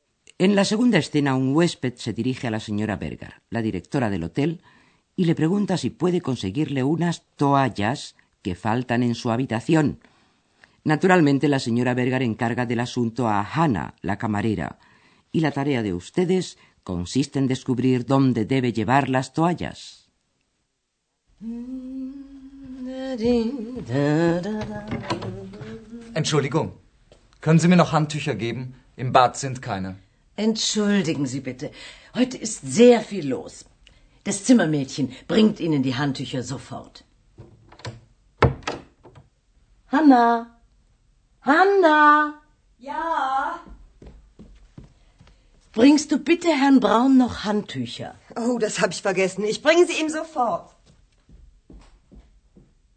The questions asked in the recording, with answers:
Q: la tarea de ustedes consiste en descubrir dónde debe llevar las toallas.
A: Hanna debe llevar las toallas a la habitación del señor Braun, que es donde faltan.